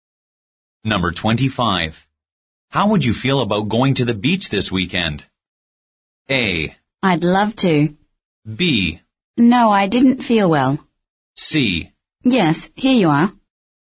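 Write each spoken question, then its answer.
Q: How would you feel about going to the beach this weekend?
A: A: I'd love to.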